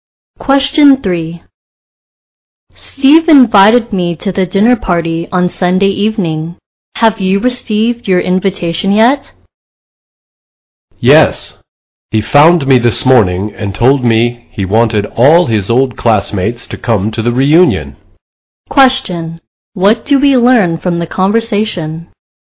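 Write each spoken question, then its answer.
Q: What do we learn from the conversation?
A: Steve is inviting his old classmates to a reunion dinner party.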